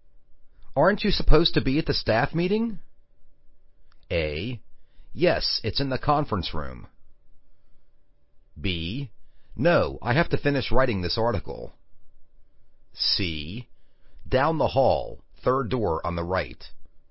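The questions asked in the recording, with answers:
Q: Aren't you supposed to be at the staff meeting?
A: B: No, I have to finish writing this article.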